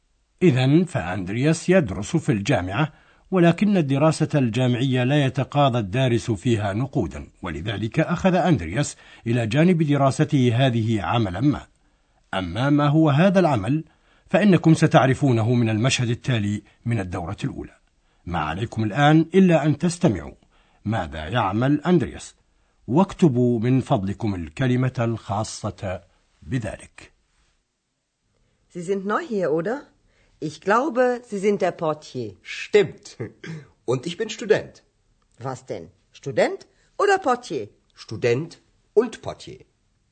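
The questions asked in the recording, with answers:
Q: ما عليكم الآن إلا أن تستمعوا ماذا يعمل أندرياس واكتبوا من فضلكم الكلمة الخاصة بذلك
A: بواب الفندق (Portier)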